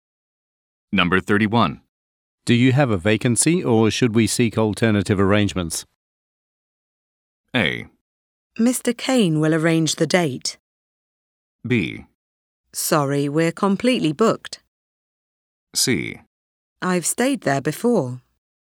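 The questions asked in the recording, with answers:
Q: Do you have a vacancy or should we seek alternative arrangements?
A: B: Sorry, we're completely booked.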